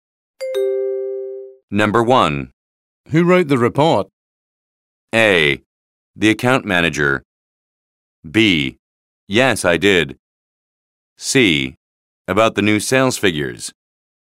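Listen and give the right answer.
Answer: A: The account manager.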